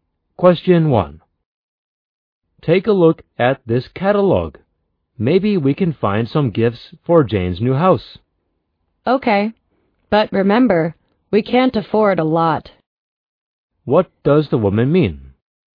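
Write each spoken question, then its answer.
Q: What does the woman mean?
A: They can't spend much money on gifts for Jane.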